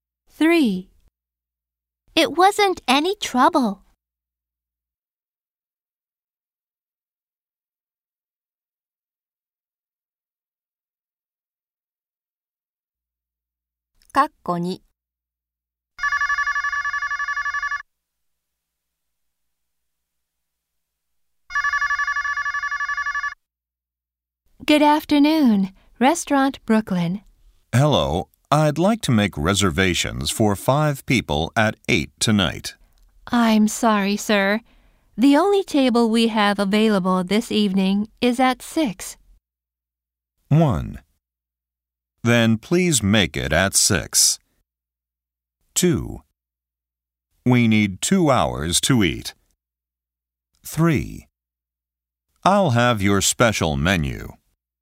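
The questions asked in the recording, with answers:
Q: I'm sorry, sir. The only table we have available this evening is at 6.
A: 1: Then please make it at 6.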